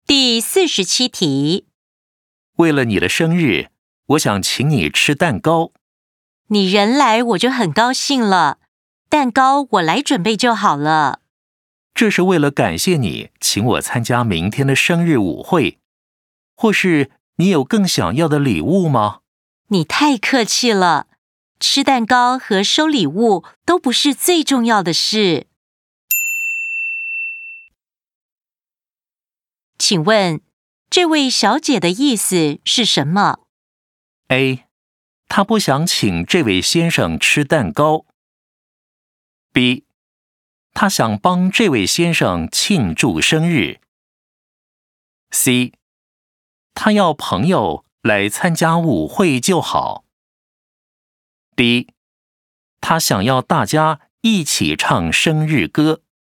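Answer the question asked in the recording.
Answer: C: 她要朋友来参加舞会就好。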